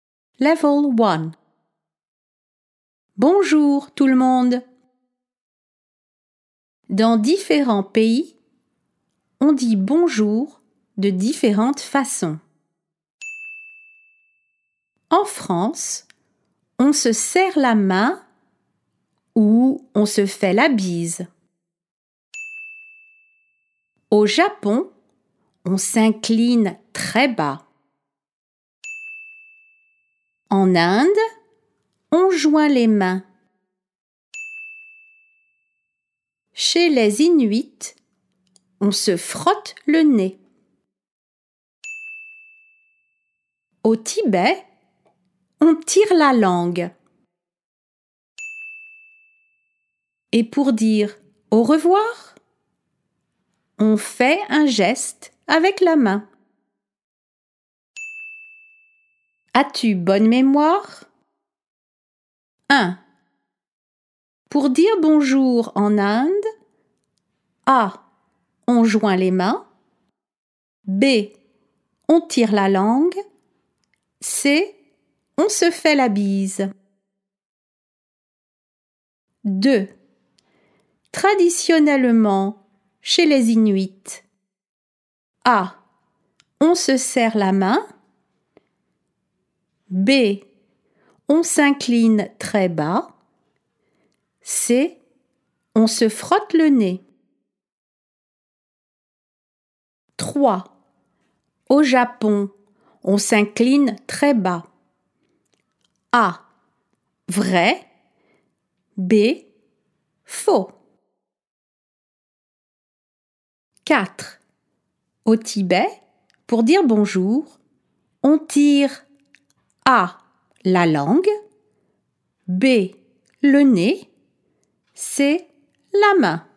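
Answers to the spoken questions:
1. A: On joint les mains.
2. C: On se frotte le nez.
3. A: Vrai.
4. A: la langue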